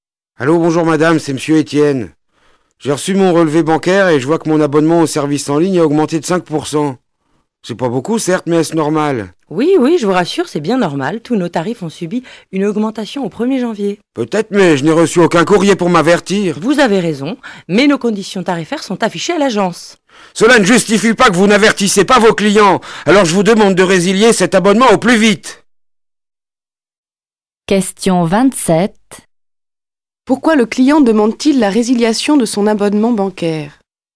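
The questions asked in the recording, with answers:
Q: Pourquoi le client demande-t-il la résiliation de son abonnement bancaire?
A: Parce que le tarif a augmenté de 5% sans qu'il en soit averti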